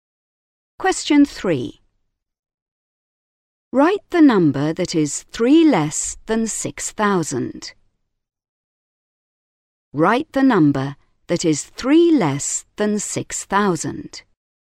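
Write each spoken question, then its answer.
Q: Write the number that is 3 less than 6,000.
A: 5997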